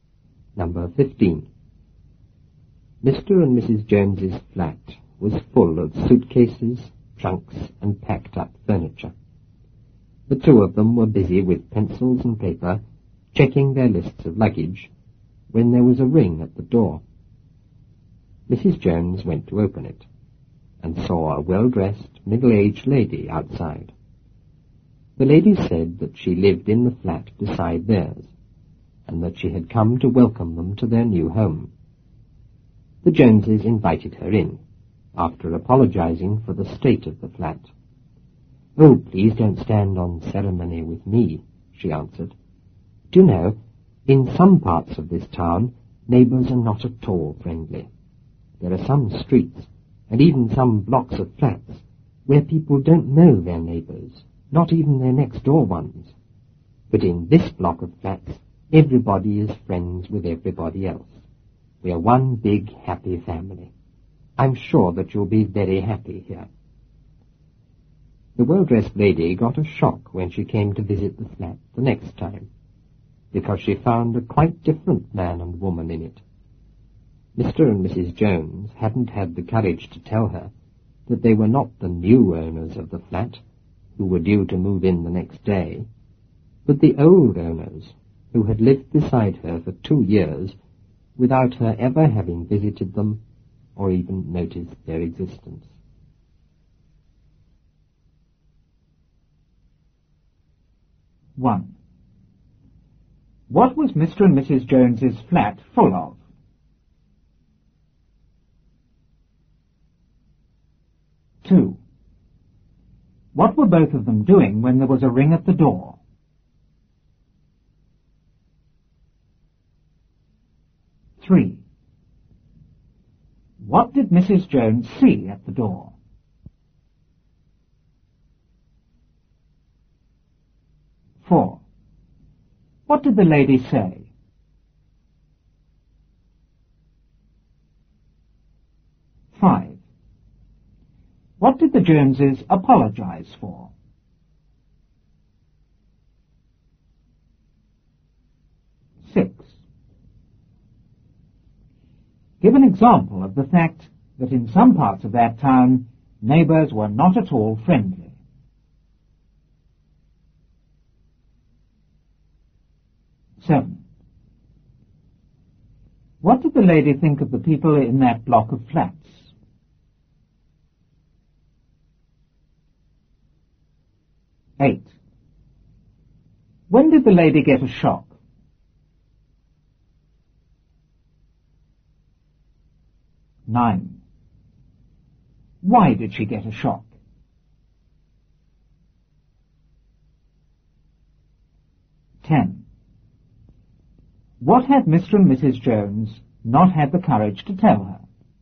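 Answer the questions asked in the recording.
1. Suitcases, trunks, and packed-up furniture
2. Checking their lists of luggage with pencils and paper
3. A well-dressed, middle-aged lady
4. That she lived in the flat beside theirs and had come to welcome them to their new home
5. The state of the flat
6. In some streets and blocks of flats, people don't know even their next-door neighbors
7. Everybody was friends with everybody else, one big happy family
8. When she came to visit the flat the next time
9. She found a quite different man and woman in it
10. That they were not the new owners but the old owners, who had lived beside her for 2 years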